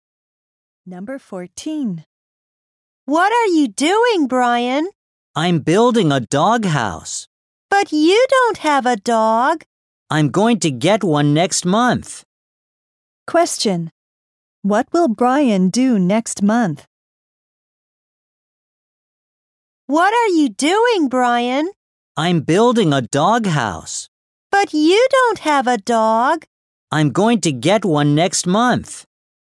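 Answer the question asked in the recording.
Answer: Get a dog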